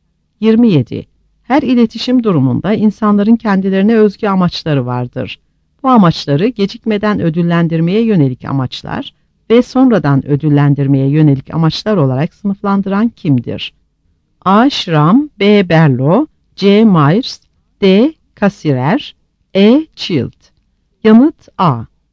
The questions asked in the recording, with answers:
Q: Bu amaçları gecikmeden ödüllendirmeye yönelik amaçlar ve sonradan ödüllendirmeye yönelik amaçlar olarak sınıflandıran kimdir?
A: Yanıt A.